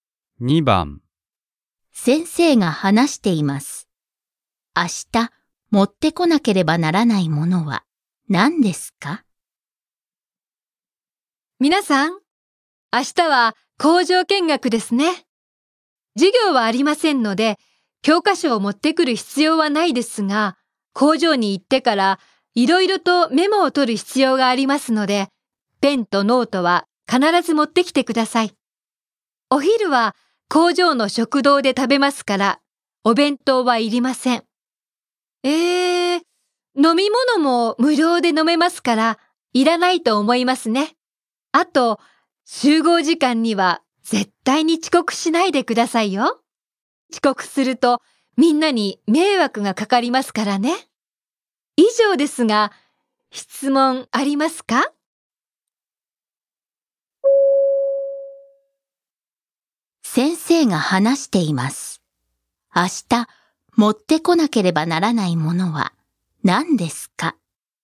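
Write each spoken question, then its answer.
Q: 先生が話しています。明日、持ってこなければならないものは何ですか?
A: ペンとノート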